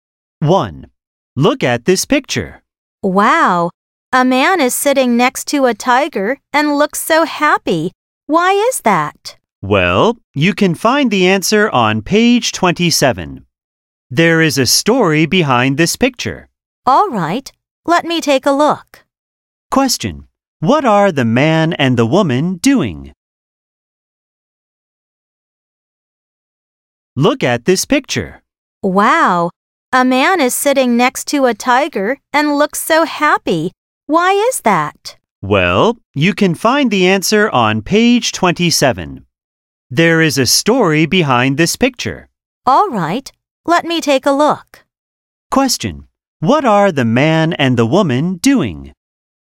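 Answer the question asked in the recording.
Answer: Looking at a picture (in a book)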